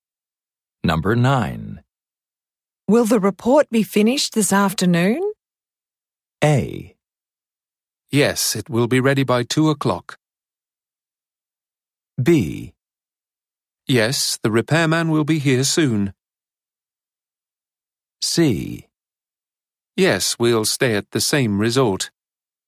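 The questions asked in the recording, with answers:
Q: Will the report be finished this afternoon?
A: A: Yes, it will be ready by 2 o'clock.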